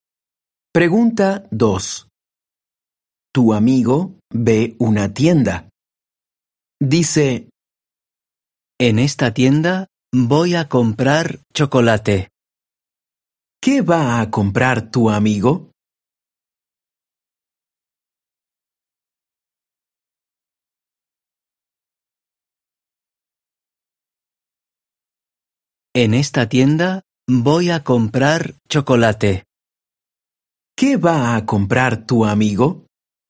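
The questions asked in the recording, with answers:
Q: ¿Qué va a comprar tu amigo?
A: Chocolate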